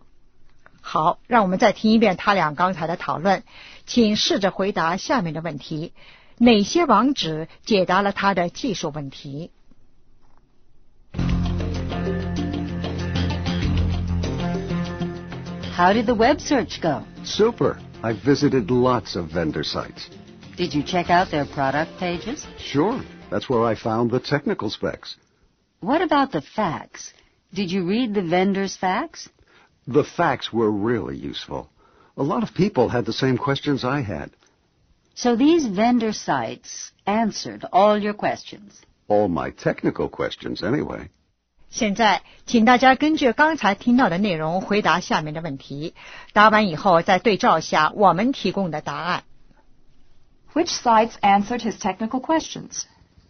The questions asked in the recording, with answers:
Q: Which sites answered his technical questions?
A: The vendors' websites.